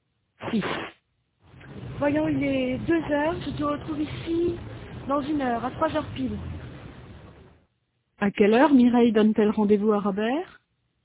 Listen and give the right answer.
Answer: À 3 heures pile.